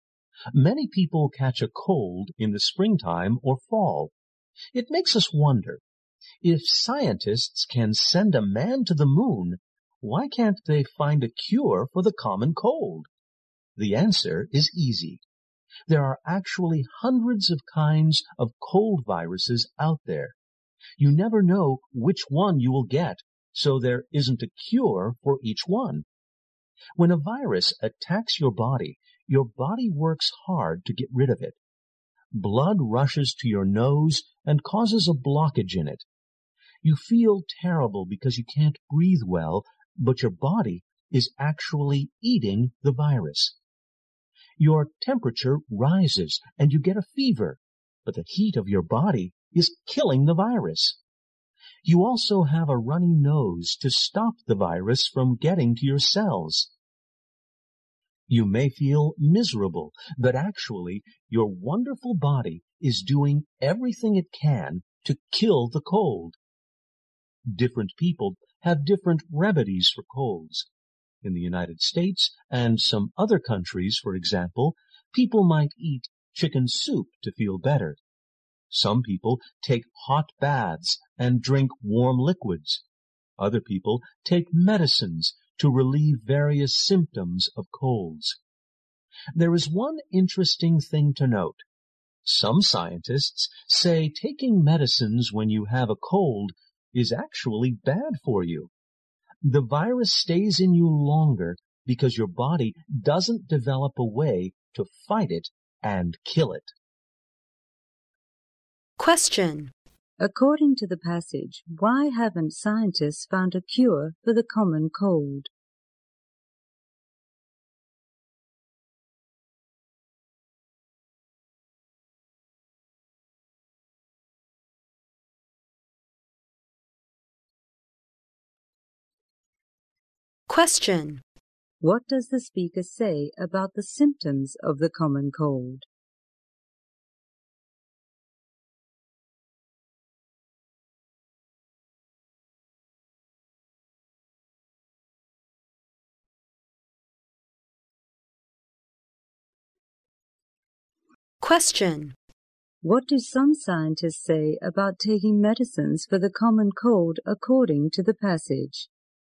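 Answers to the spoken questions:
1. There are hundreds of kinds of cold viruses, so there isn't a cure for each one.
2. They are signs the body is fighting and killing the virus.
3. It is bad for you; the virus stays longer because the body doesn't develop a way to fight it.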